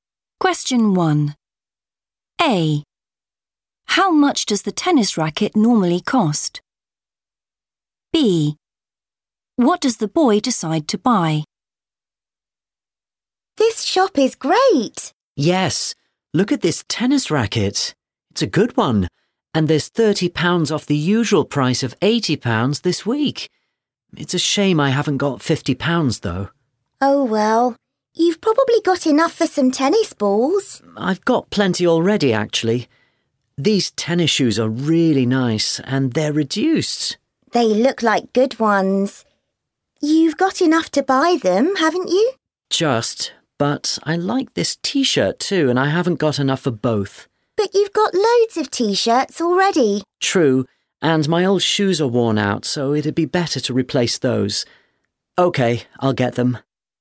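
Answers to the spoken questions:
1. £80
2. tennis shoes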